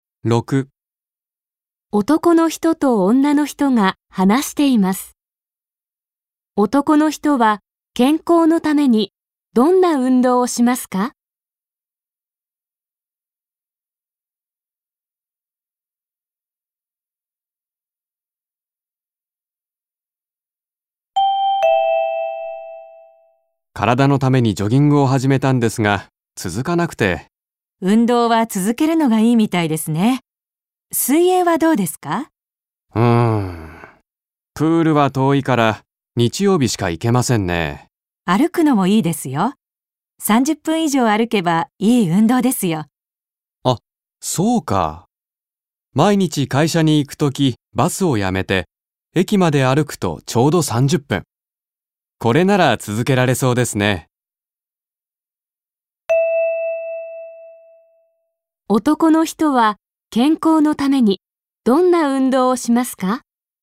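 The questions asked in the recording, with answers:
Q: 男の人は健康のためにどんな運動をしますか?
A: 毎日駅まで歩く(30分)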